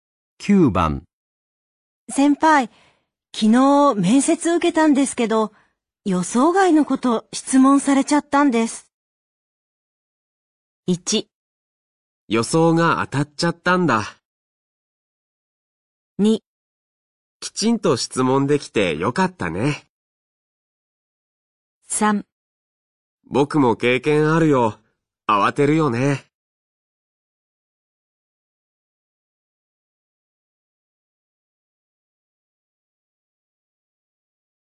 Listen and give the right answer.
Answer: 3

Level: N3 Listening · Test 9